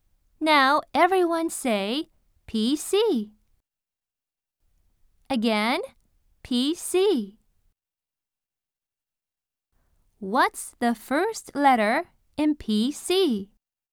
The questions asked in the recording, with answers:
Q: What's the first letter in PC?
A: That's right. It's P.